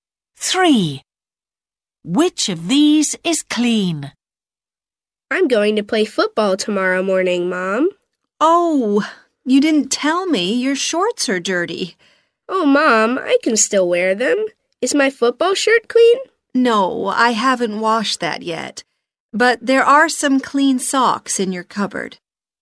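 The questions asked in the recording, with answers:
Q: Which of these is clean?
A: socks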